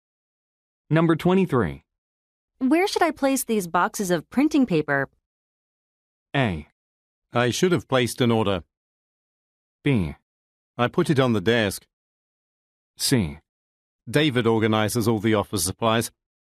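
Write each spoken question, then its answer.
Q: Where should I place these boxes of printing paper?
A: C: David organizes all the office supplies.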